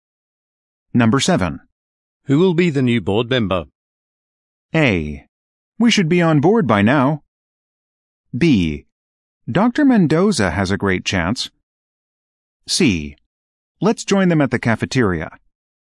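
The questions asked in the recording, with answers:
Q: Who will be the new board member?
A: B: Dr. Mendoza has a great chance.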